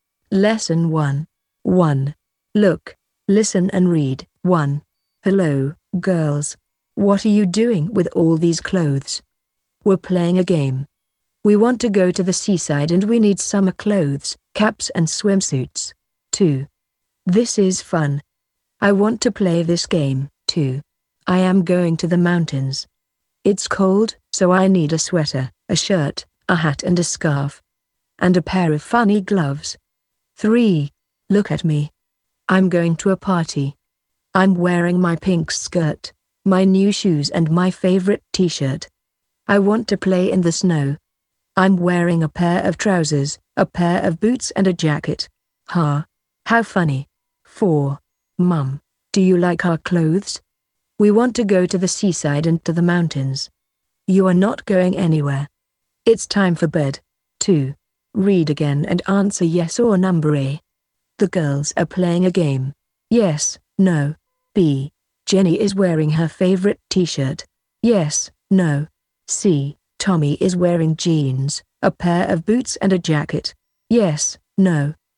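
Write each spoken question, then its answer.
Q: The girls are playing a game.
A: Yes

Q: Tommy is wearing jeans, a pair of boots and a jacket.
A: No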